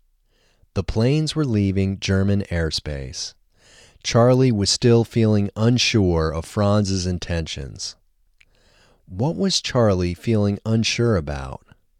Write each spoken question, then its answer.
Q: What was Charlie feeling unsure about?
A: Charlie was feeling unsure about Franz's intentions.